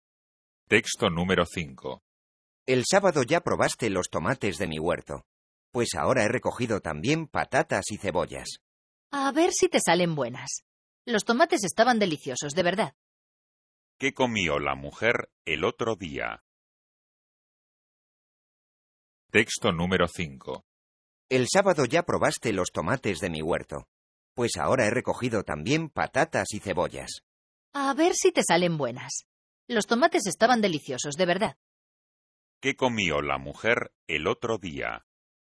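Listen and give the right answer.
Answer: Tomates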